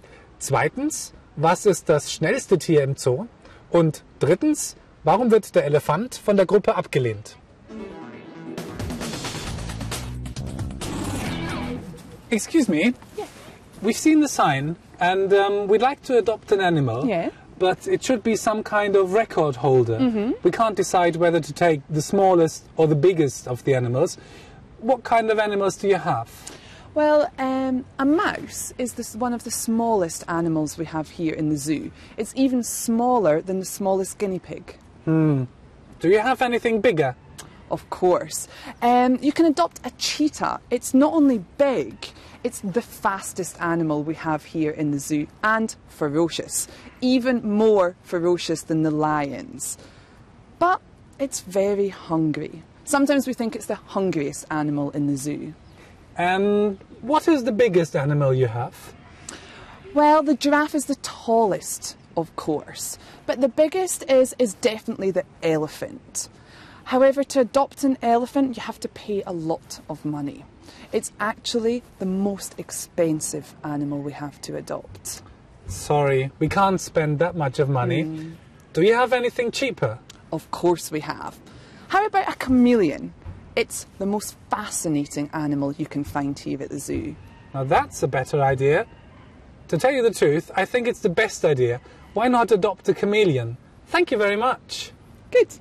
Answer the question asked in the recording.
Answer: Der Elefant ist das teuerste Tier von allen.